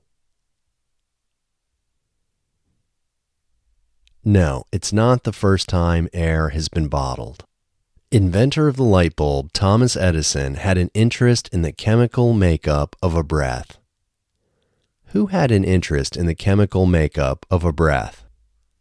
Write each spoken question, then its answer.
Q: Who had an interest in the chemical makeup of a breath?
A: Inventor of the light bulb, Thomas Edison, had an interest in the chemical makeup of a breath.